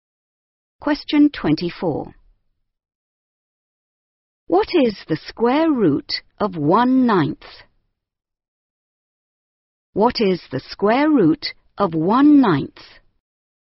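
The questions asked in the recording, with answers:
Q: What is the square root of 1/9?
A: 1/3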